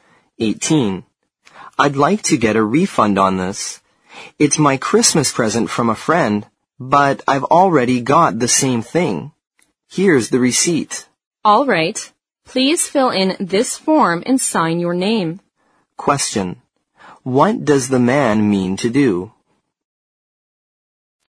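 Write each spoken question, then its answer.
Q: What does the man mean to do?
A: Get a refund for a Christmas present, because he already has the same thing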